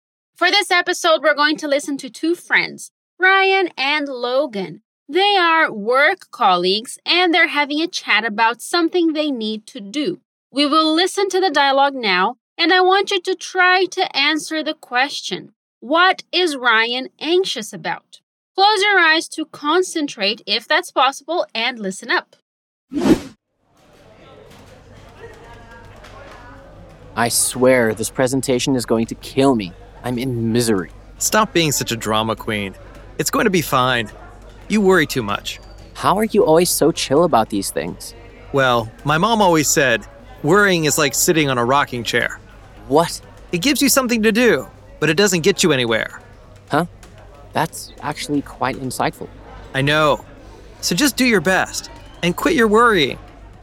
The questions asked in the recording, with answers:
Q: What is Ryan anxious about?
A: A presentation.